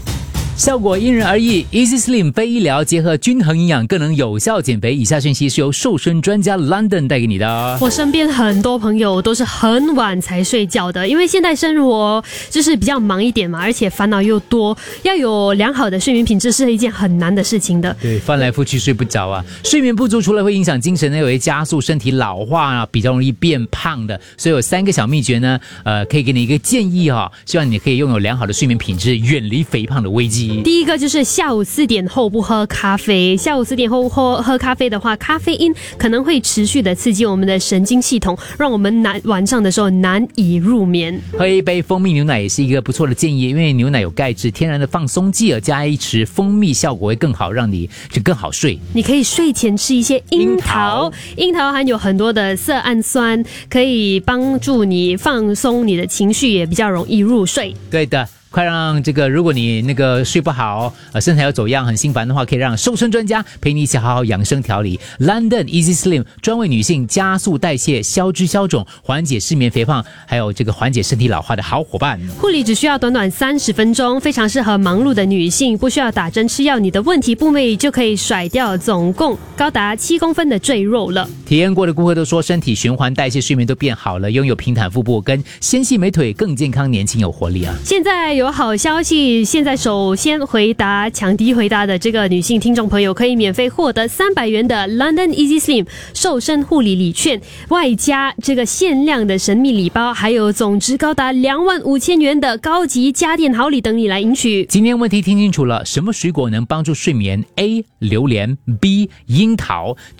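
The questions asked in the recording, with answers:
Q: 什么水果能帮助睡眠? A 榴莲, B 樱桃。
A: B: 樱桃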